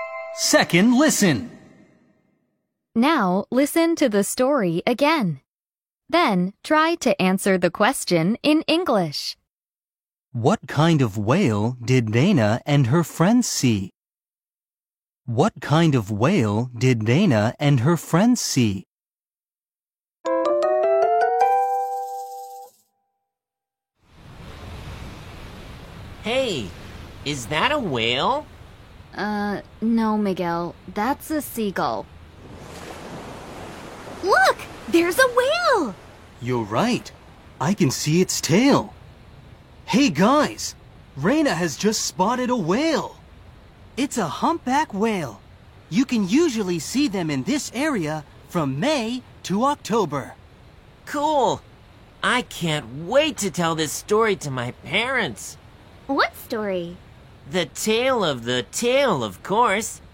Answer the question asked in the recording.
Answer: The answer is a humpback whale.